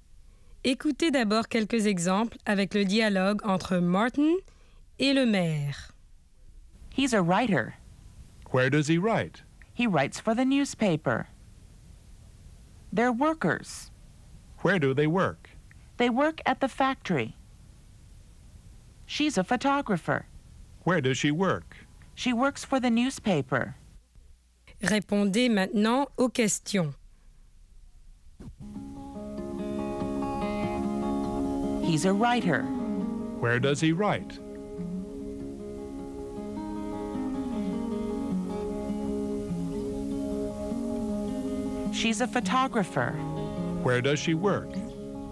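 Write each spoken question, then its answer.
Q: Where does he write?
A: He writes for the newspaper.

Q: Where does she work?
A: She works for the newspaper.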